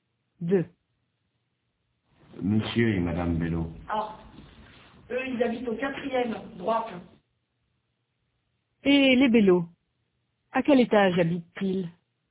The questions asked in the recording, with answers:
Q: Et les Bello, à quel étage habitent-ils?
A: Au 4e étage.